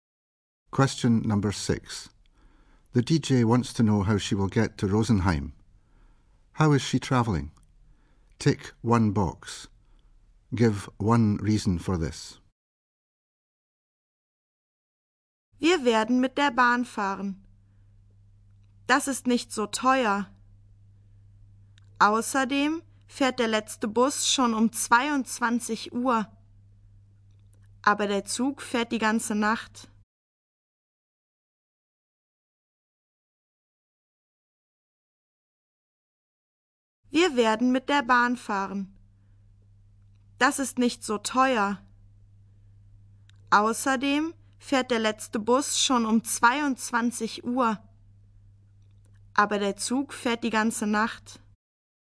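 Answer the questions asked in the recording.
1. By train
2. It's not so expensive / the last bus leaves at 10 pm, but the train runs all night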